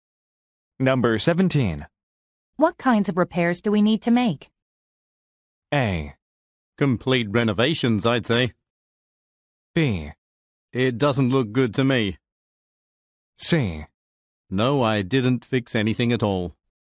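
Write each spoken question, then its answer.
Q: What kinds of repairs do we need to make?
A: A: Complete renovations, I'd say.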